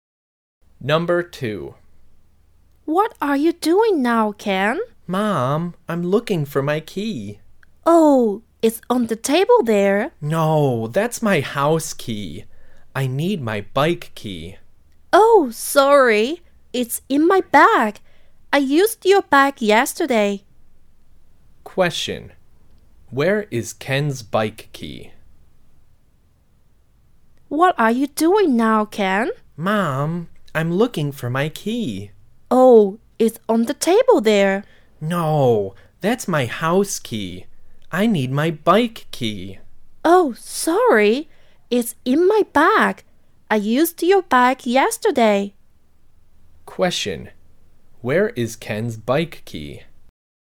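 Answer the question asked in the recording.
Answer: In his mother's bag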